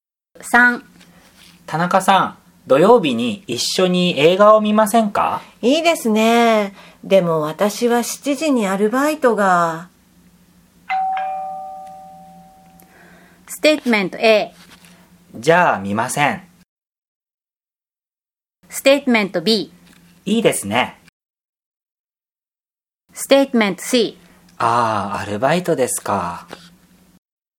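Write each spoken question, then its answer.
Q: いいですね。でも私は7時にアルバイトが。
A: C: ああ、アルバイトですか。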